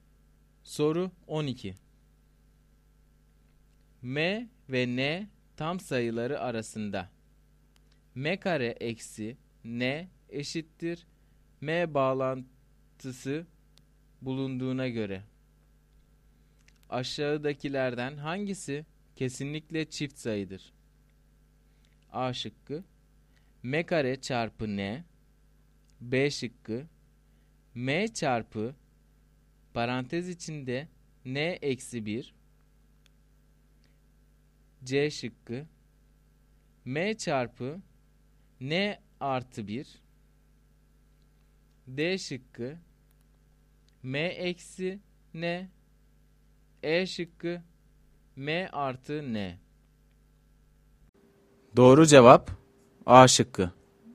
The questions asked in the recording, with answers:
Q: M ve N tam sayıları arasında M kare eksi N eşittir M bağlantısı bulunduğuna göre aşağıdakilerden hangisi kesinlikle çift sayıdır?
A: Doğru cevap A şıkkı.